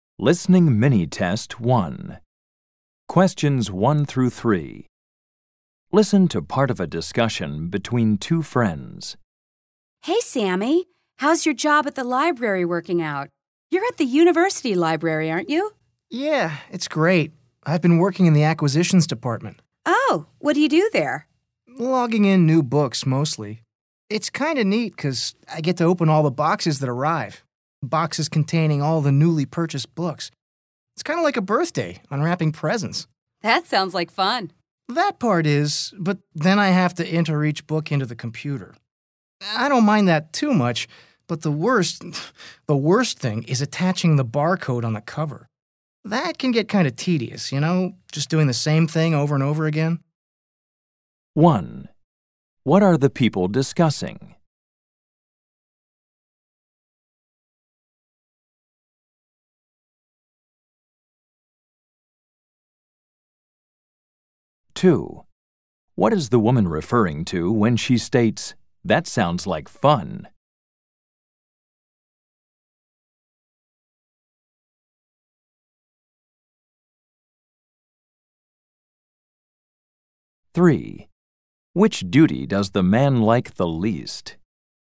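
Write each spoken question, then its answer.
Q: What are the people discussing?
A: The man's job in the university library's acquisitions department

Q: What is the woman referring to when she states, "That sounds like fun"?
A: Opening the boxes of newly purchased books

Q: Which duty does the man like the least?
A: Attaching the barcode to the cover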